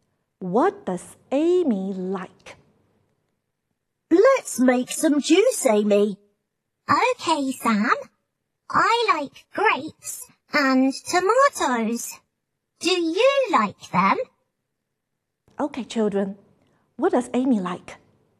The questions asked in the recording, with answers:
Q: Okay, children. What does Amy like?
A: She likes grapes and tomatoes.